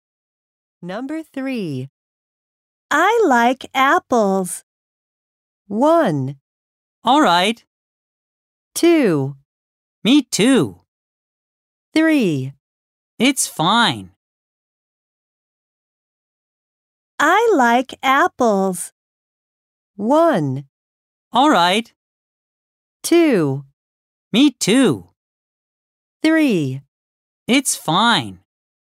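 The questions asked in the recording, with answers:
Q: I like apples.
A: 2: Me too.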